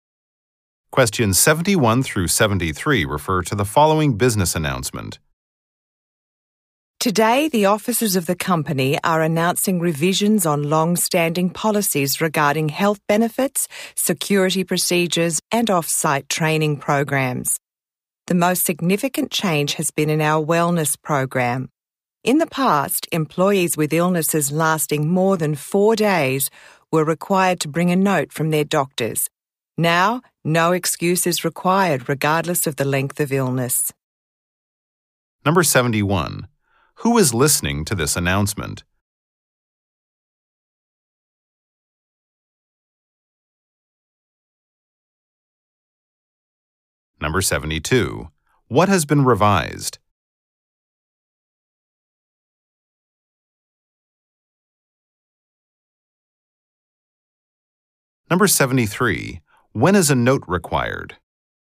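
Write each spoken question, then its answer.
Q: Who is listening to this announcement?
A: Company employees

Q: What has been revised?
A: Company policies (health benefits, security, training)

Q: When is a note required?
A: Never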